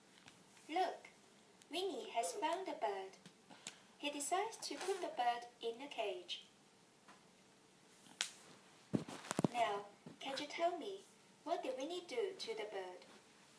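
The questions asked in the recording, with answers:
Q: Now, can you tell me what did Winnie do to the bird?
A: He put the bird in a cage.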